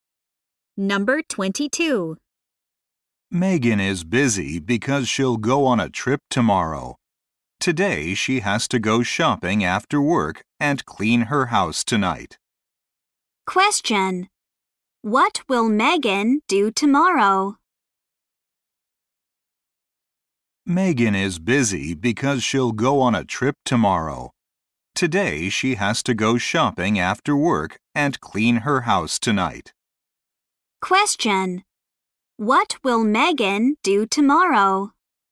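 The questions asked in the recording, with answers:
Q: What will Megan do tomorrow?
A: Go on a trip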